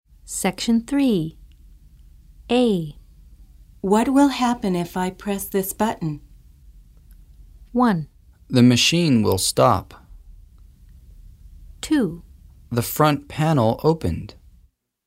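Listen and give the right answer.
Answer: 1: The machine will stop.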